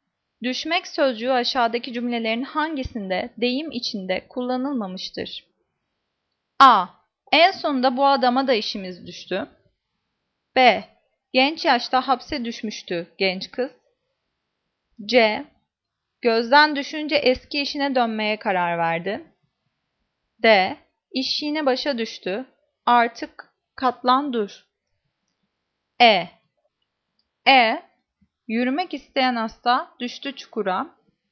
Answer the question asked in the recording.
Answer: Cevap E. Yürümek isteyen hasta düştü çukura.